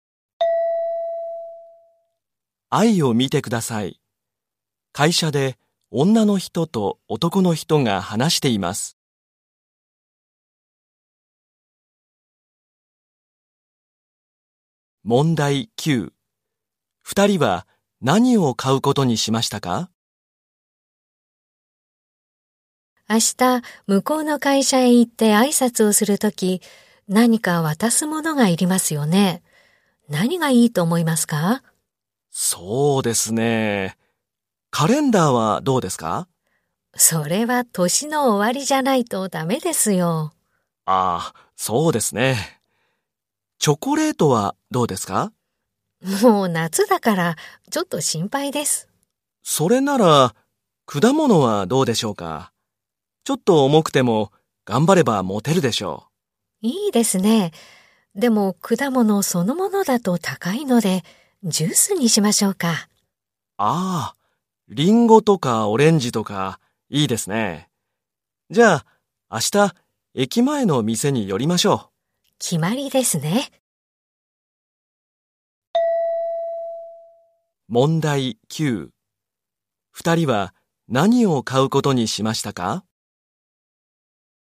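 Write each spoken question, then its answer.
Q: 二人は何を買うことにしましたか?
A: ジュース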